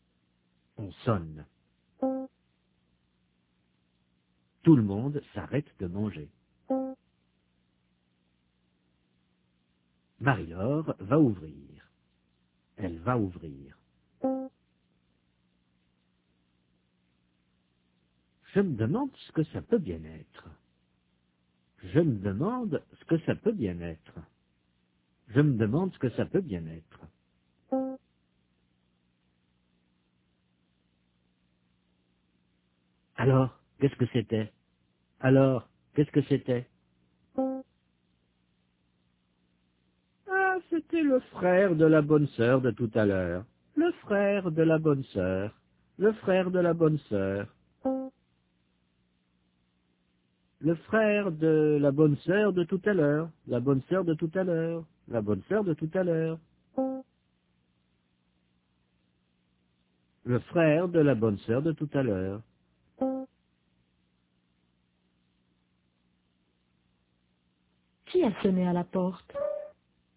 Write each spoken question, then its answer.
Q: Qui a sonné à la porte?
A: Le frère de la bonne sœur.